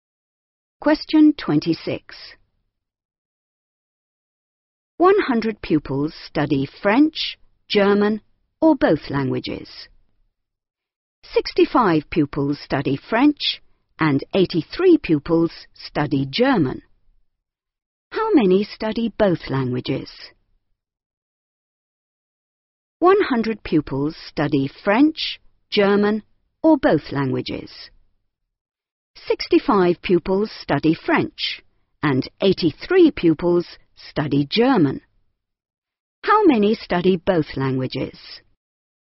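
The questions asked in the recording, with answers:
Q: How many study both languages?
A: 48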